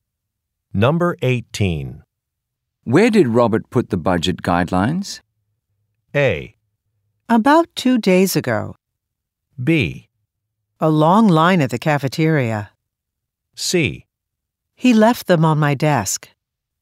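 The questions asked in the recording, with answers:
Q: Where did Robert put the budget guidelines?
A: C: He left them on my desk.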